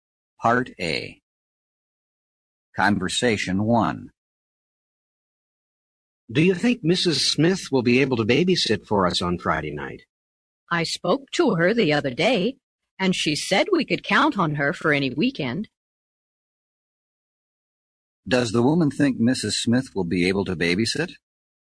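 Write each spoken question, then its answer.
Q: Does the woman think Mrs. Smith will be able to babysit?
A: Yes, she can count on her for any weekend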